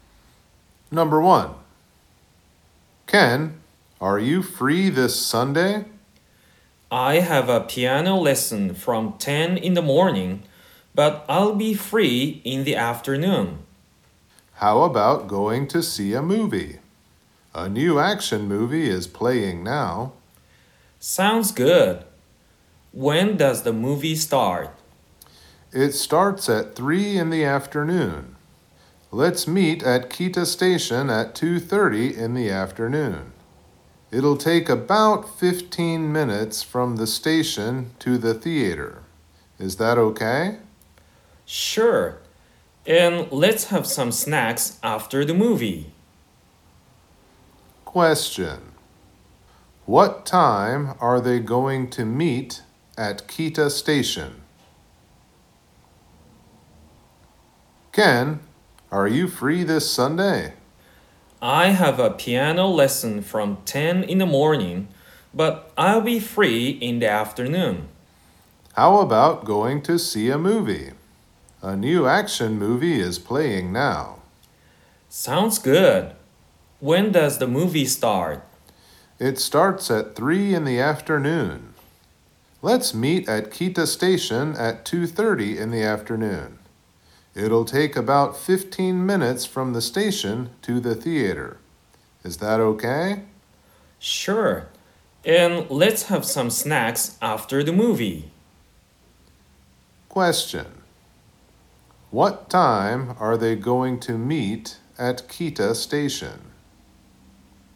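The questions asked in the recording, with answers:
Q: What time are they going to meet at Kita Station?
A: At 2:30 in the afternoon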